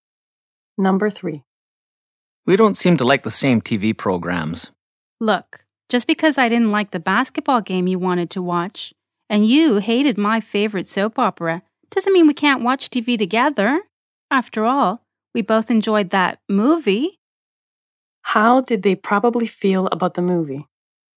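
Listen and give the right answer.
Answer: They both enjoyed it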